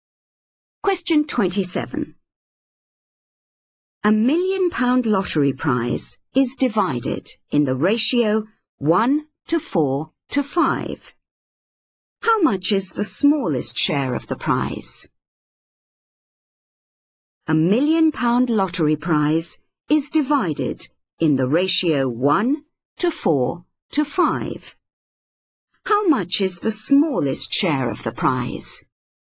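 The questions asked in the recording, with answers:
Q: How much is the smallest share of the prize?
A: £100,000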